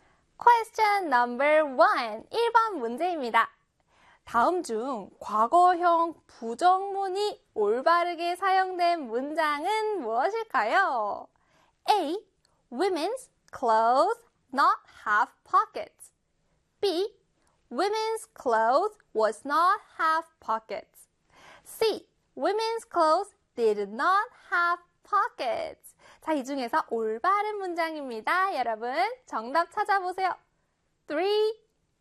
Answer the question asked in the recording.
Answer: 정답은요, 바로 네, C의 Women's clothes did not have pockets 입니다.